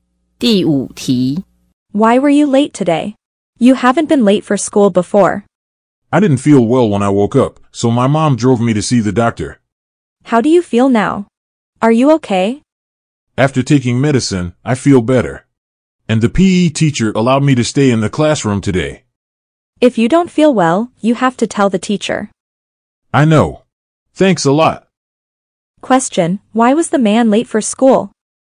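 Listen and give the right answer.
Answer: He felt sick and his mom drove him to the doctor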